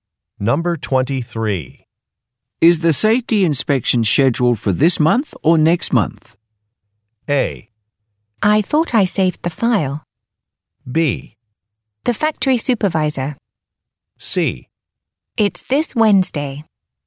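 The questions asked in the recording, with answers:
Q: Is the safety inspection scheduled for this month or next month?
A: C: It's this Wednesday.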